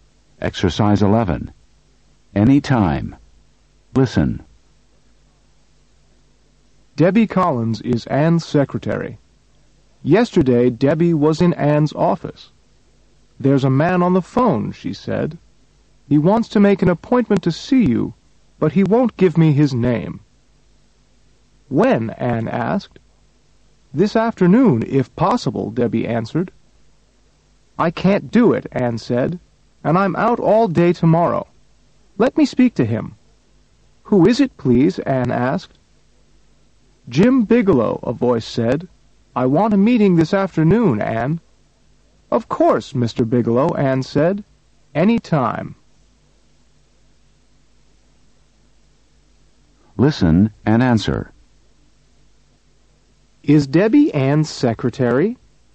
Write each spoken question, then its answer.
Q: Is Debbie Anne's secretary?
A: Yes, she is.